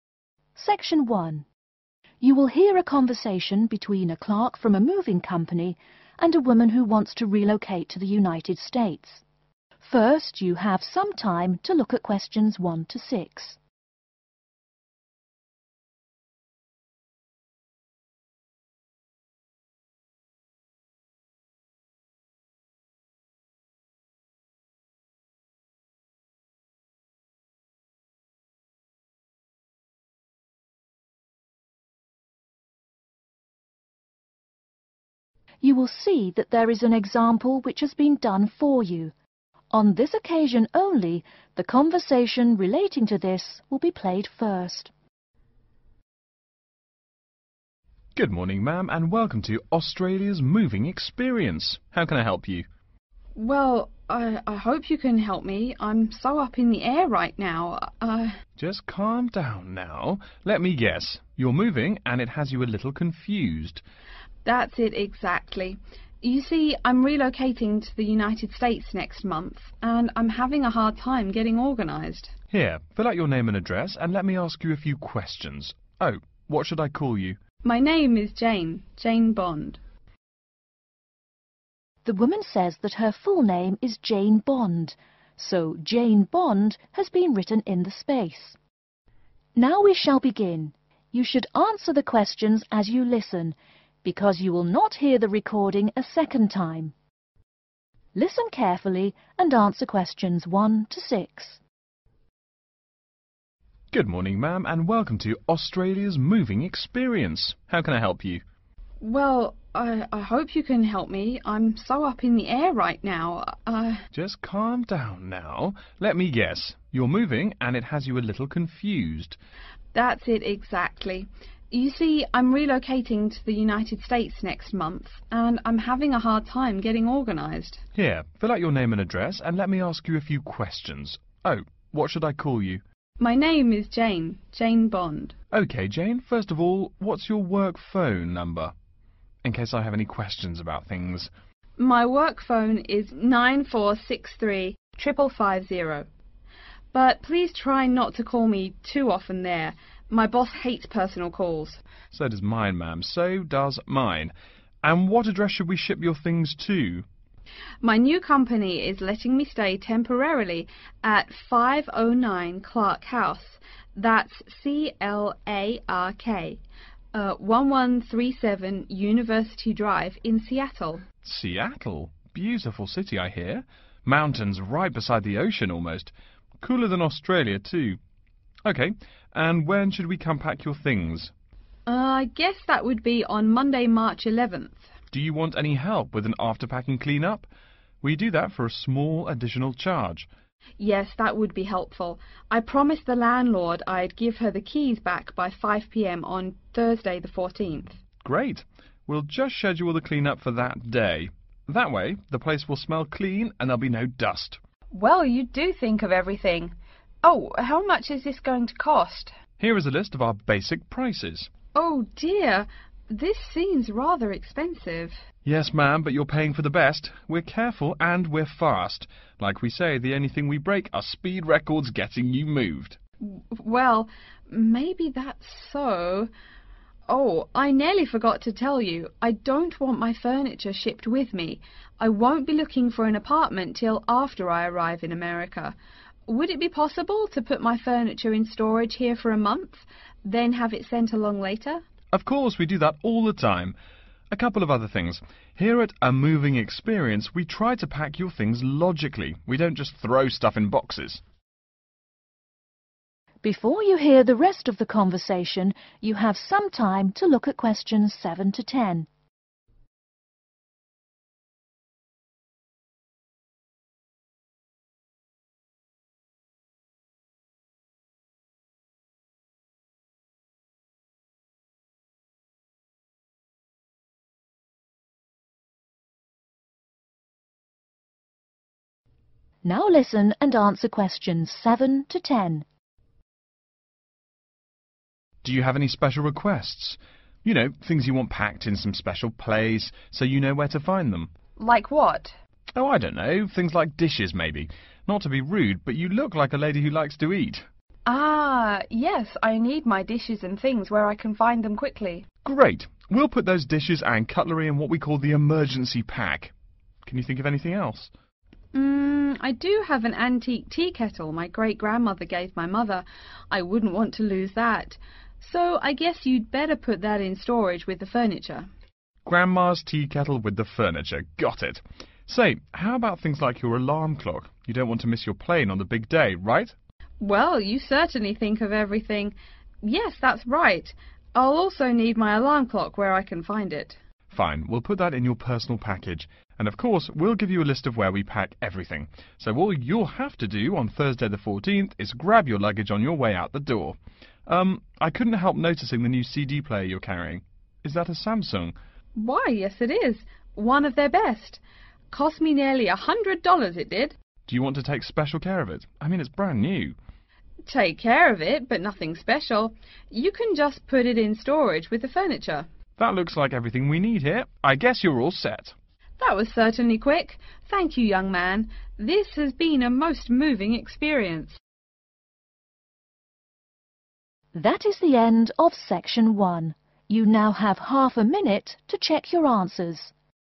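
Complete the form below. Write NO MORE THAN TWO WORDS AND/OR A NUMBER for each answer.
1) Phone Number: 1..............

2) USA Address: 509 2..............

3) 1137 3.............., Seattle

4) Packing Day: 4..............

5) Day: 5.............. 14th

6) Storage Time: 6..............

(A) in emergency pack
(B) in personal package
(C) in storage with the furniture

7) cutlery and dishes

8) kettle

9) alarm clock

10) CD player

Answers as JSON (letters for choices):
{"1": "9463-5550", "2": "Clark House", "3": "University Drive", "4": "Monday", "5": "Thursday", "6": "a month", "7": "A", "8": "C", "9": "B", "10": "C"}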